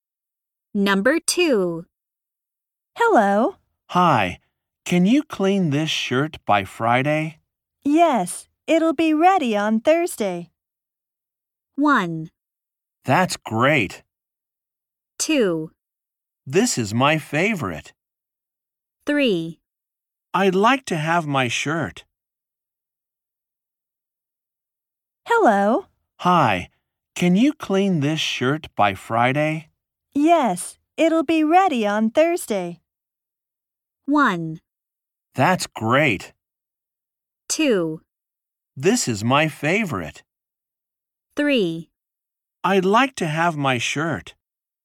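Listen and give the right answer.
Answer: 1: That's great.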